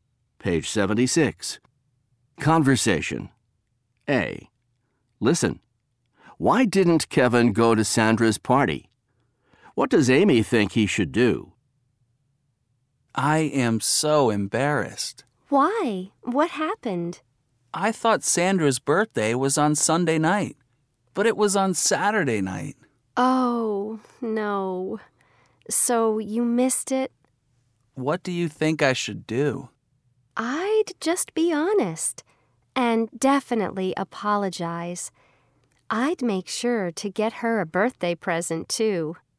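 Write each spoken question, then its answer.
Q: Why didn't Kevin go to Sandra's party?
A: He thought her birthday party was on Sunday night, but it was on Saturday night.

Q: What does Amy think he should do?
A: Be honest, apologize, and get her a birthday present.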